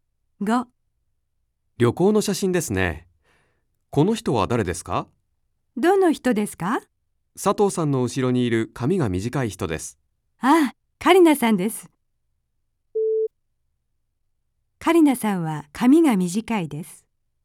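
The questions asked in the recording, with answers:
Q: カリナさんは髪が短いです。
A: ○(正しい)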